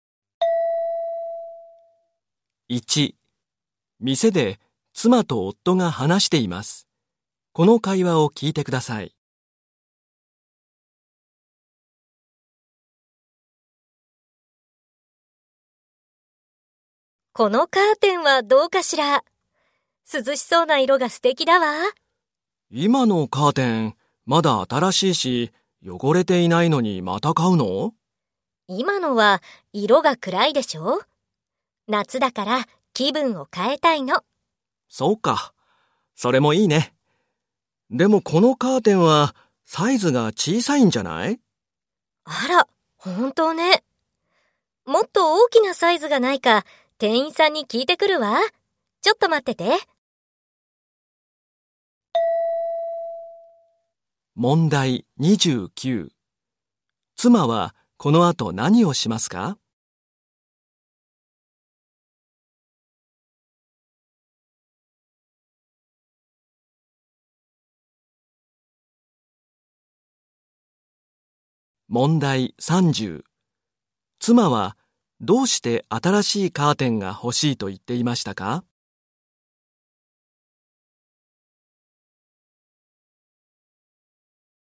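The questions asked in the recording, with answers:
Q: 妻はこの後何をしますか?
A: もっと大きなサイズがないか店員に聞きに行く

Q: 妻はどうして新しいカーテンが欲しいと言っていましたか?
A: 今のは色が暗く、夏だから気分を変えたいから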